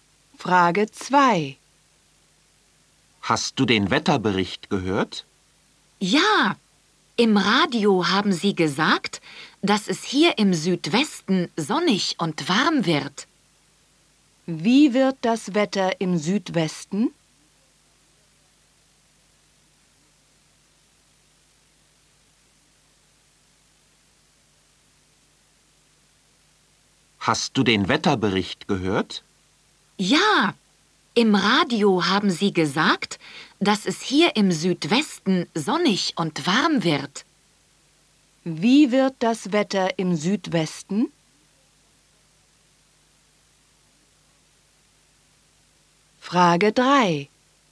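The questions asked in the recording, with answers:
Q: Wie wird das Wetter im Südwesten?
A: Sonnig und warm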